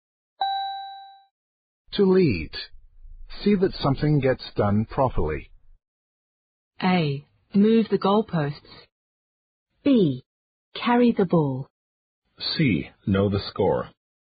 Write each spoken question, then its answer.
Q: To lead. See that something gets done properly.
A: The answer is B. Carry the ball.